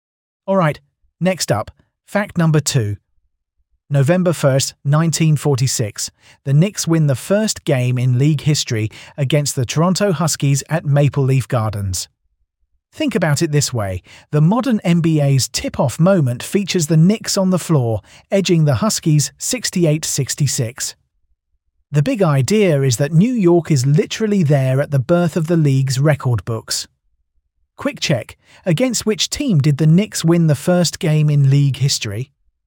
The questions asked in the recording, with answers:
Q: Against which team did the Knicks win the first game in league history?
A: Correct answer. Toronto Huskies.